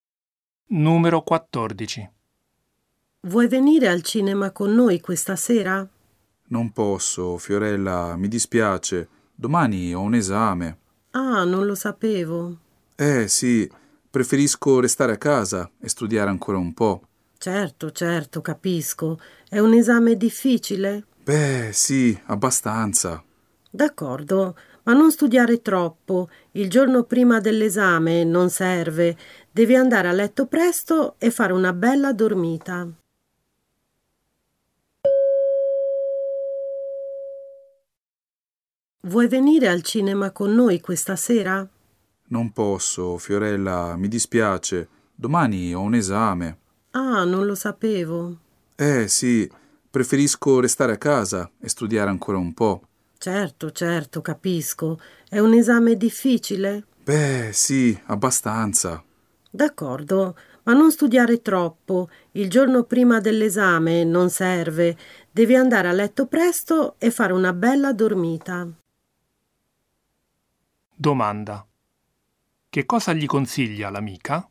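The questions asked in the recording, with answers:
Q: Che cosa gli consiglia l'amica?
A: Di non studiare troppo e andare a letto presto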